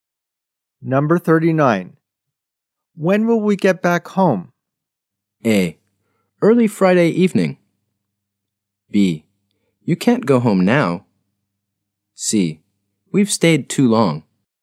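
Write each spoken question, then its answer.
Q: When will we get back home?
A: A: Early Friday evening.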